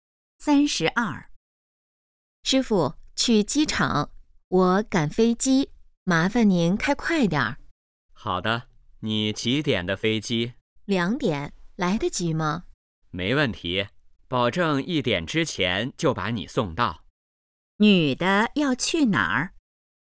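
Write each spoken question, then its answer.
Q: 女的要去哪儿?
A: 机场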